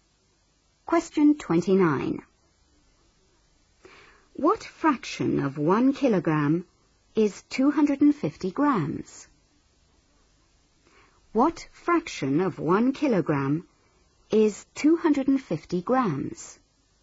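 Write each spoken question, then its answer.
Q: What fraction of 1 kilogram is 250 grams?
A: 1/4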